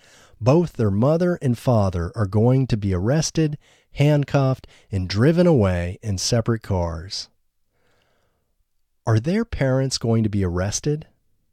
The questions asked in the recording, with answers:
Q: Are their parents going to be arrested?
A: Yes, their parents are going to be arrested.